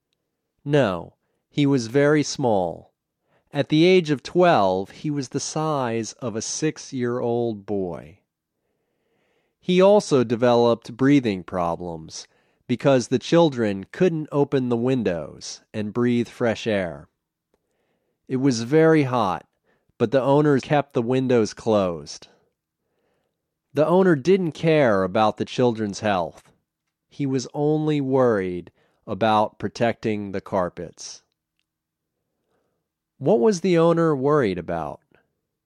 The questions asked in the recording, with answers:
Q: What was the owner worried about?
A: He was worried about protecting the carpets.